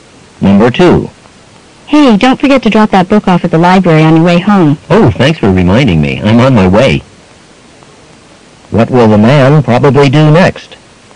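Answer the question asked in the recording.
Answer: Take the book to the library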